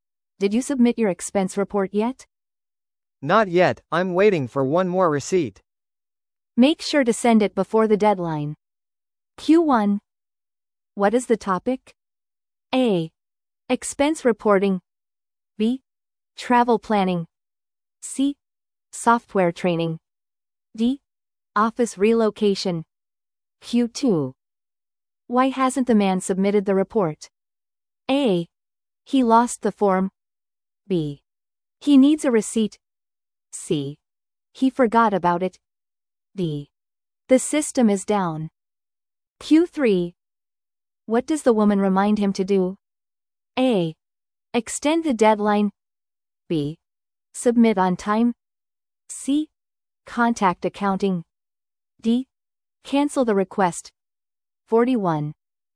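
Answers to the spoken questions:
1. A: Expense reporting.
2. B: He needs a receipt.
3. B: Submit on time.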